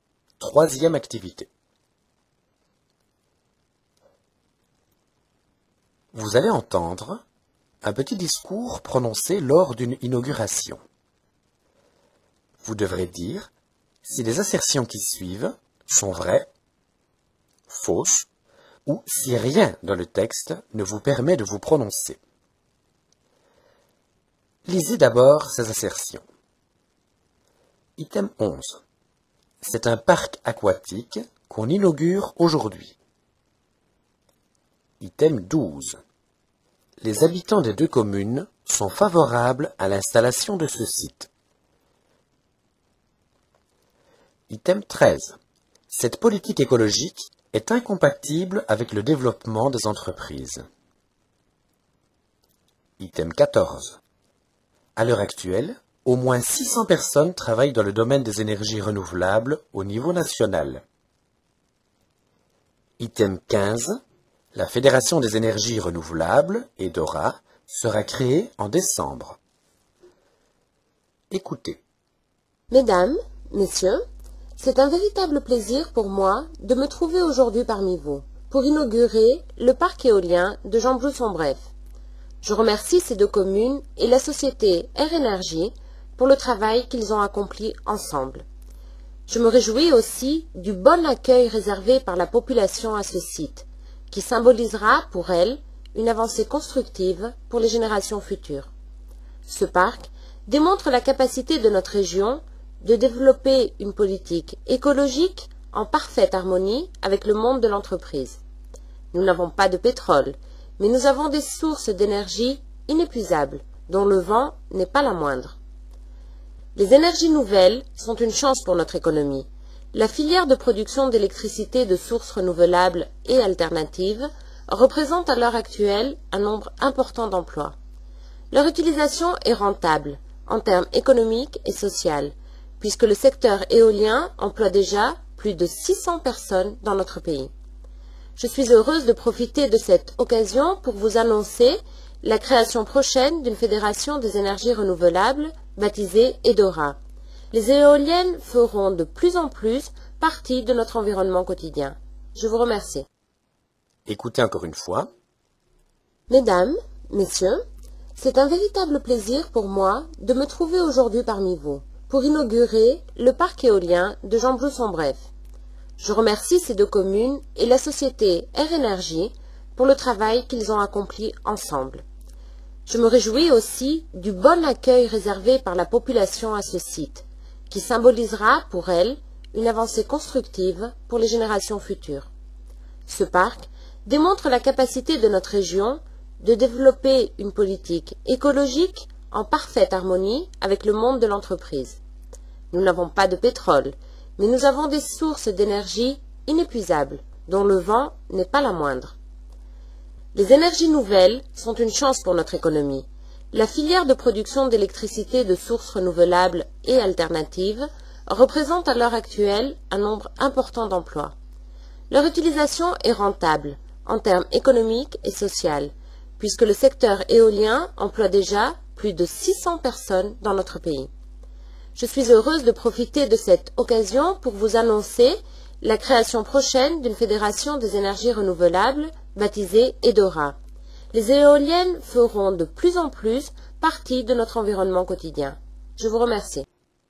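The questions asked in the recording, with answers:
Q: C'est un parc aquatique qu'on inaugure aujourd'hui.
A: Faux

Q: Les habitants des deux communes sont favorables à l'installation de ce site.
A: Vrai

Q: Cette politique écologique est incompatible avec le développement des entreprises.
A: Faux

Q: À l'heure actuelle, au moins 600 personnes travaillent dans le domaine des énergies renouvelables au niveau national.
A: Vrai

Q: La Fédération des énergies renouvelables, EDORA, sera créée en décembre.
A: On ne peut pas se prononcer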